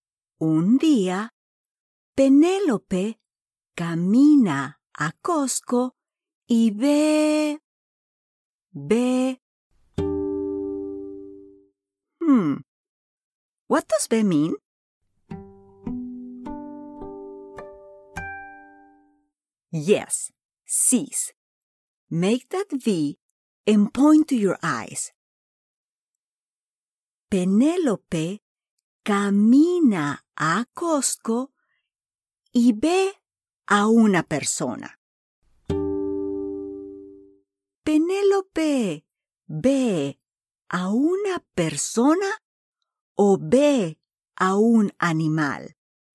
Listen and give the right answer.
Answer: Sí, a una persona.